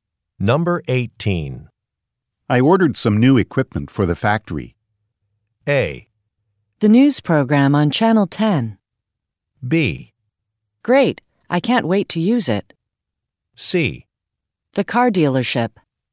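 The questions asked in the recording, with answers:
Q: I ordered some new equipment for the factory.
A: B: Great, I can't wait to use it.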